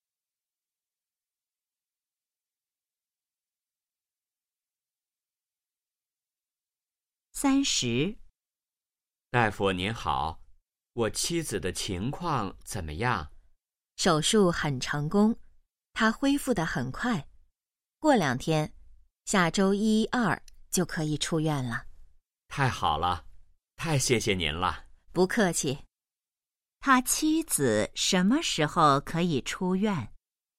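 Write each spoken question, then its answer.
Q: 他妻子什么时候可以出院?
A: 下周一或周二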